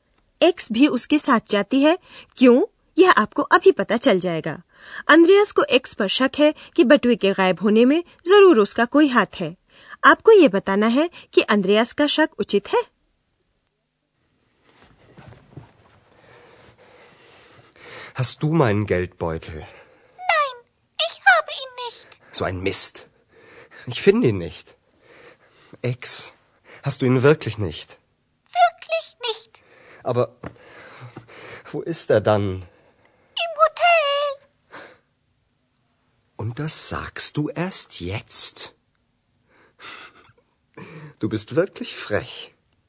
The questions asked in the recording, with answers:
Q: आपको ये बताना है कि अंद्रयास का शक उचित है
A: इतना तो सही है कि x के पास बटुआ नहीं था लेकिन उसे यह जरूर मालूम था कि अंद्रयास बटुए को hotel में भूल आया है